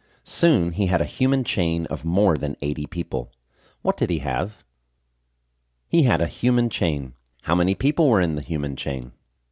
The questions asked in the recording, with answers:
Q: How many people were in the human chain?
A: More than 80 people were in the human chain.